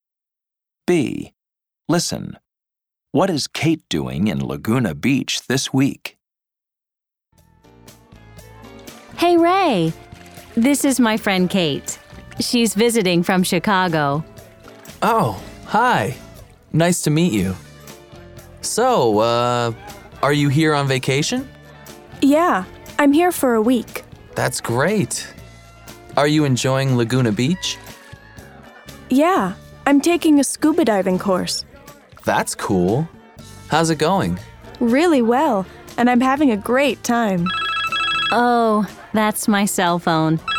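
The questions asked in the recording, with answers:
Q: What is Kate doing in Laguna Beach this week?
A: She's on vacation and taking a scuba diving course.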